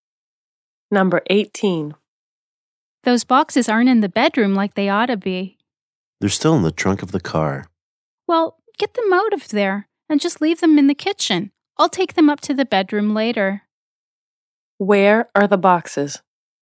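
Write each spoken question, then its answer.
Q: Where are the boxes?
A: In the trunk of the car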